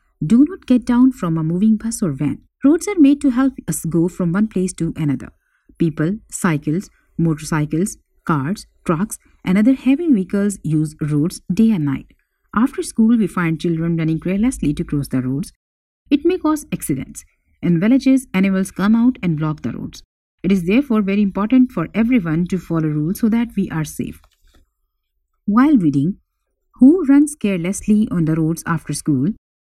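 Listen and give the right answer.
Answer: Children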